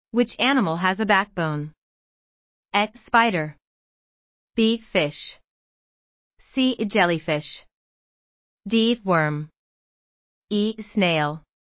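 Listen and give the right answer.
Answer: B: Fish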